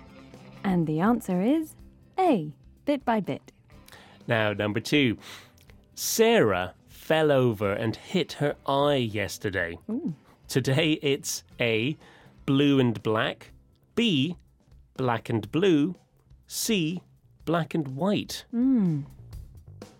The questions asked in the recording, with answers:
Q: Sarah fell over and hit her eye yesterday.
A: And the answer is B, black and blue.